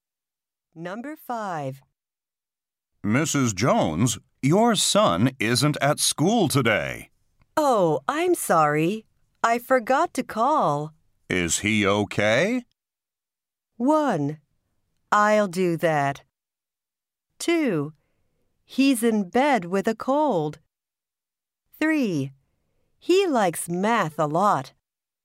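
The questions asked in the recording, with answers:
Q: Is he okay?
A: 2: He's in bed with a cold.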